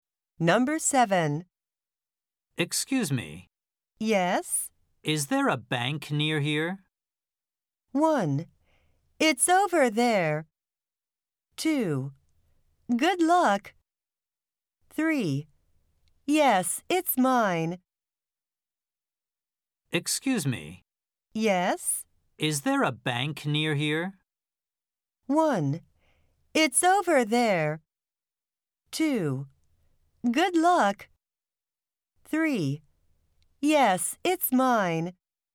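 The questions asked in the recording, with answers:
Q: Is there a bank near here?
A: 1: It's over there.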